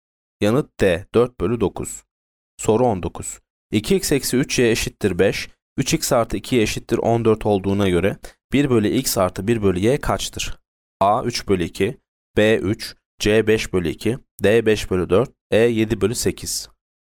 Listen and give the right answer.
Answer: Yanıt D. 5 bölü 4.